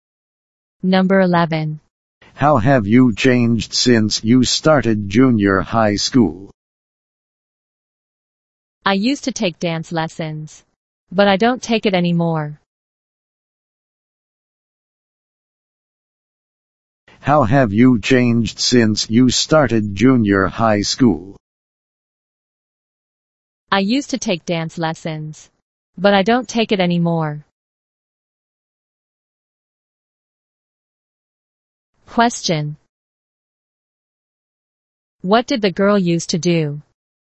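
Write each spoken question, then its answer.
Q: What did the girl used to do?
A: Take dance lessons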